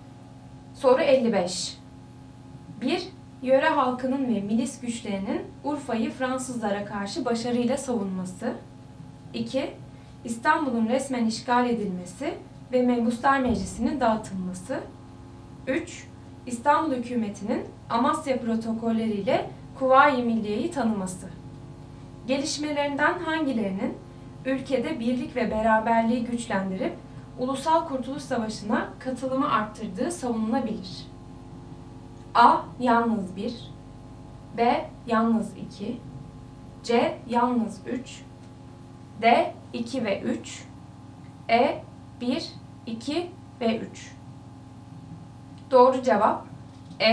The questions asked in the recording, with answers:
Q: Gelişmelerinden hangilerinin ülkede birlik ve beraberliği güçlendirip Ulusal Kurtuluş Savaşı'na katılımı arttırdığı savunulabilir?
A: Doğru cevap E. 1, 2 ve 3.